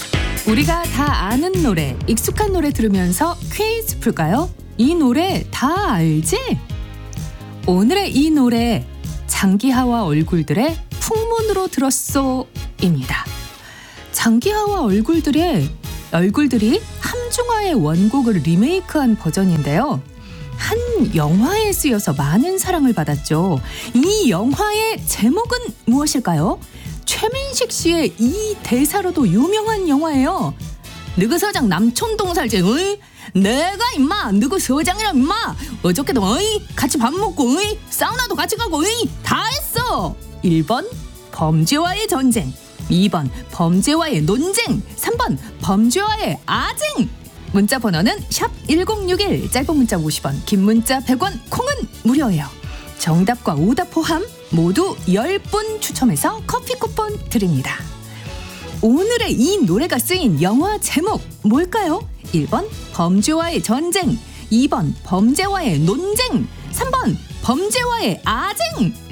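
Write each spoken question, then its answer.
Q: 오늘의 이 노래가 쓰인 영화 제목 뭘까요?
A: 1번: 범죄와의 전쟁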